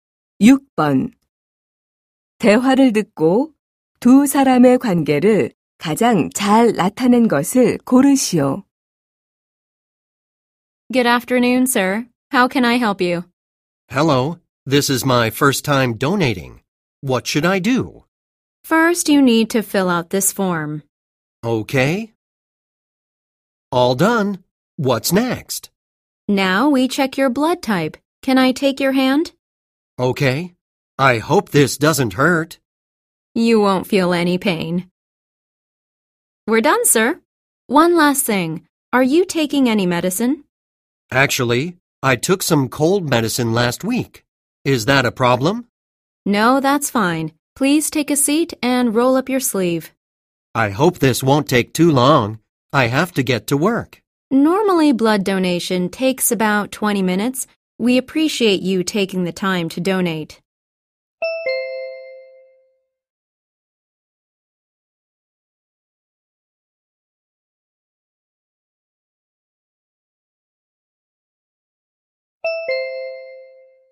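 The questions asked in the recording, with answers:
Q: 대화를 듣고 두 사람의 관계를 가장 잘 나타낸 것을 고르시오.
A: 헌혈자 - 헌혈 담당 간호사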